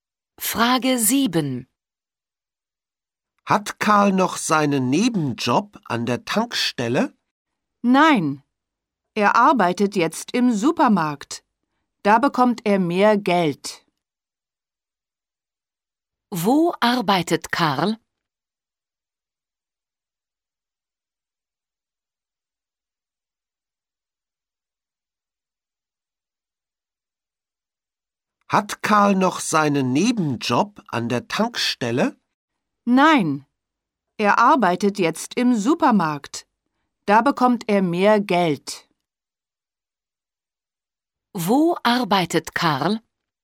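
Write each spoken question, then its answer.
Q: Wo arbeitet Karl?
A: Im Supermarkt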